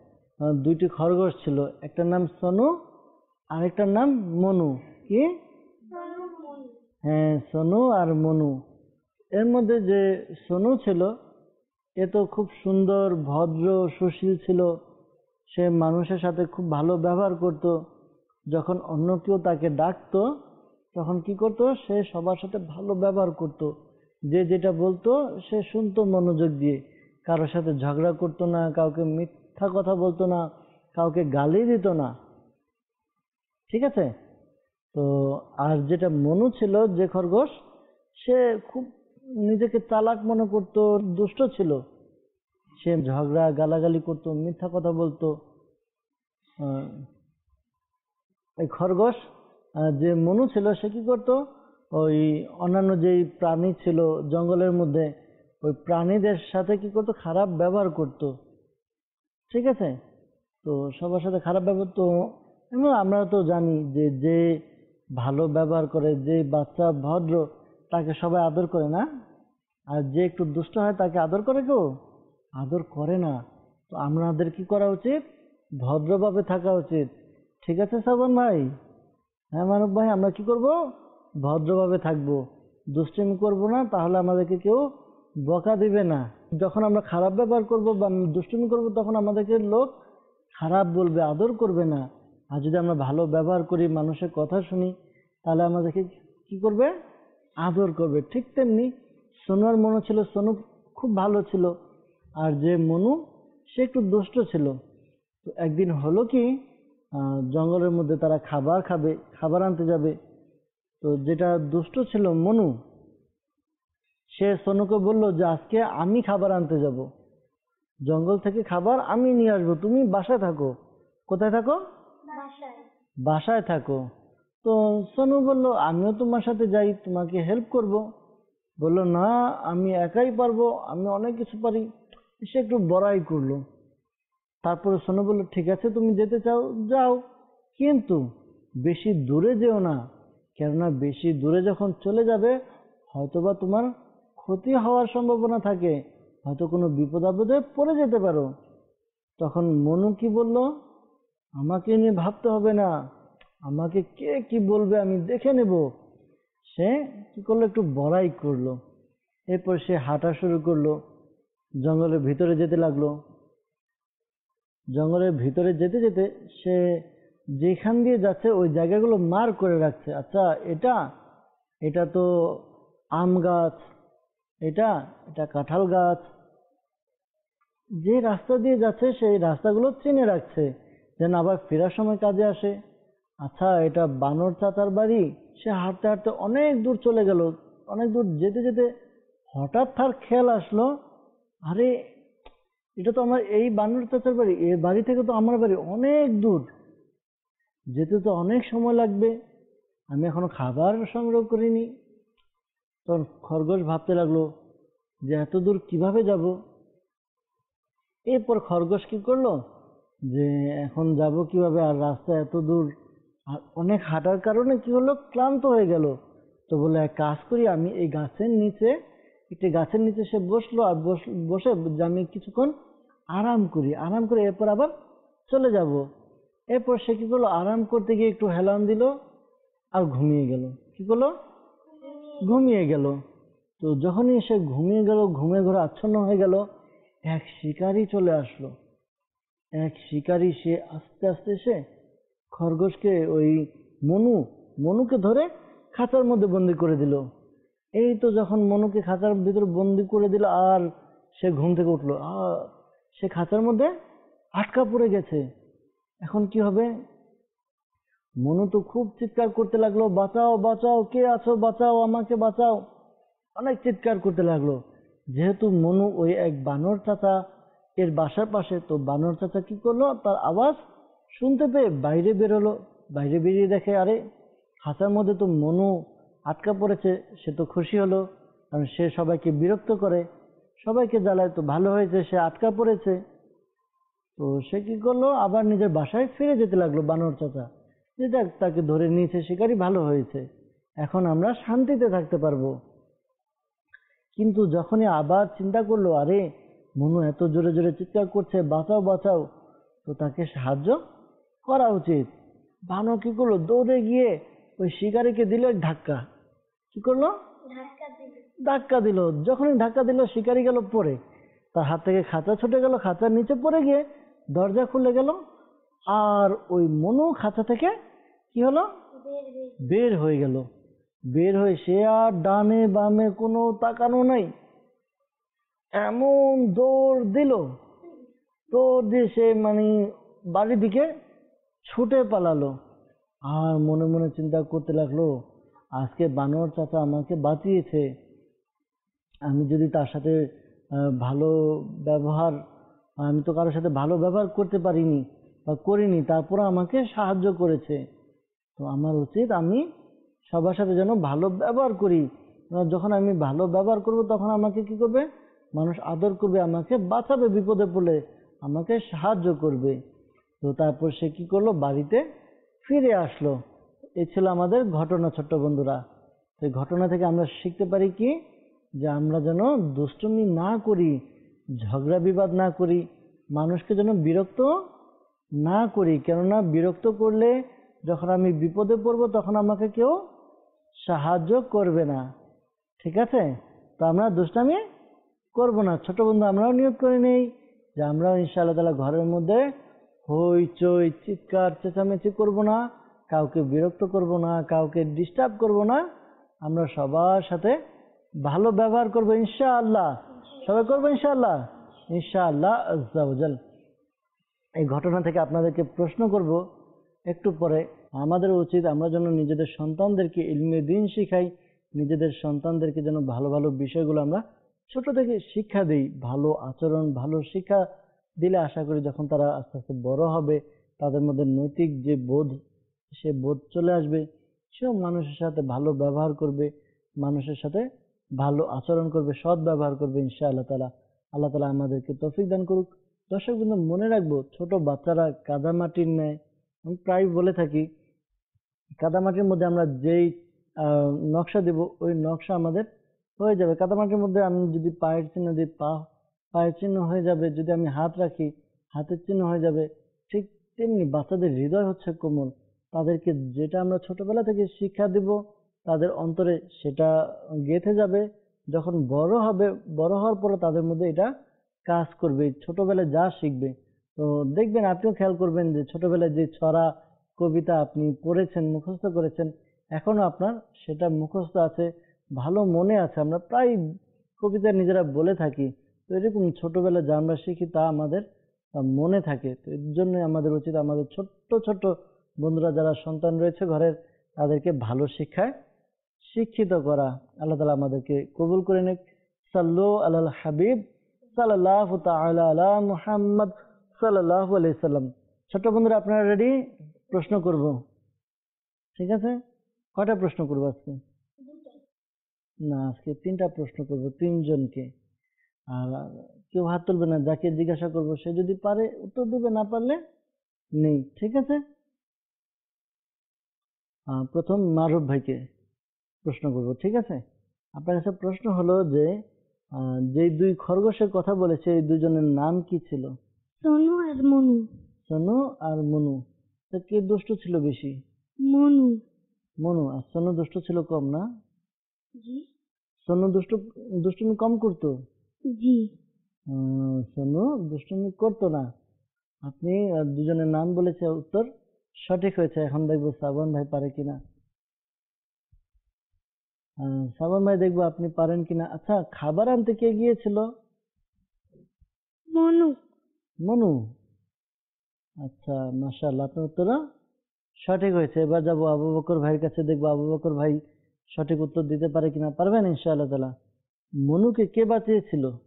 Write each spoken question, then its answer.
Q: আপনার কাছে প্রশ্ন হলো যে যে দুই খরগোশের কথা বলেছে এই দুজনের নাম কি ছিল?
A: সোনু আর মনু।

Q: আচ্ছা, খাবার আনতে কে গিয়েছিল?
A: মনু।

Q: মনুকে কে বাঁচিয়েছিল?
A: বানর চাচা।